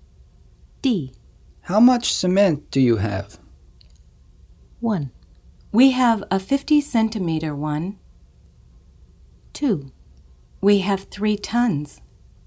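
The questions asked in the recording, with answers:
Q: How much cement do you have?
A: 2: We have 3 tons.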